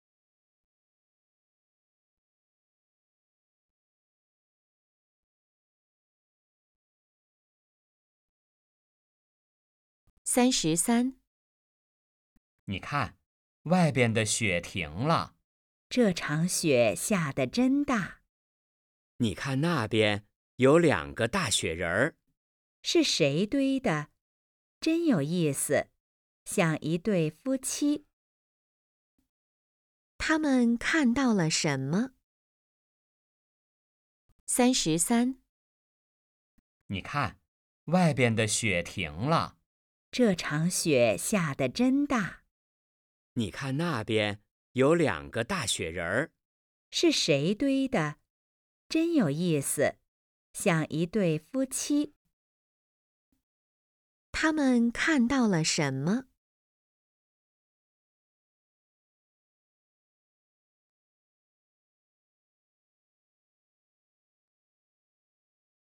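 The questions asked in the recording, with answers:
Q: 他们看到了什么?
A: 两个大雪人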